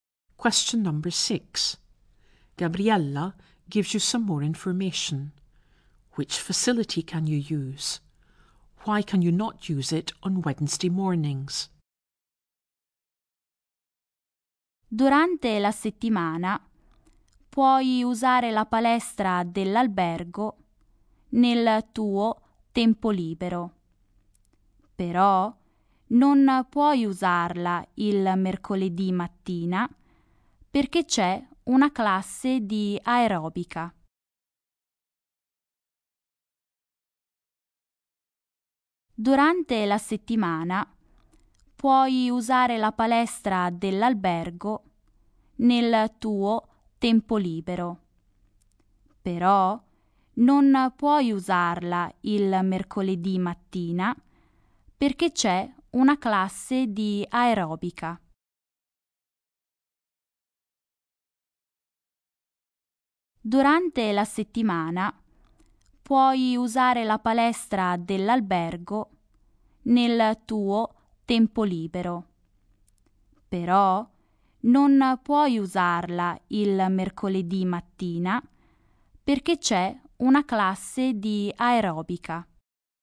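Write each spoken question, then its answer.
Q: Which facility can you use?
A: The hotel gym

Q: Why can you not use it on Wednesday mornings?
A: There is an aerobics class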